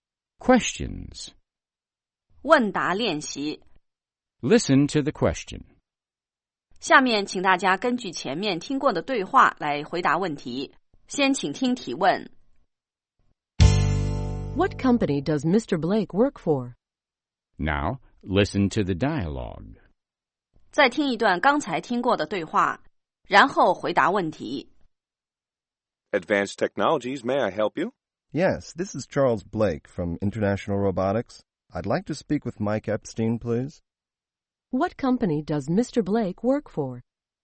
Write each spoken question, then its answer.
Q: What company does Mr. Blake work for?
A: He works for International Robotics.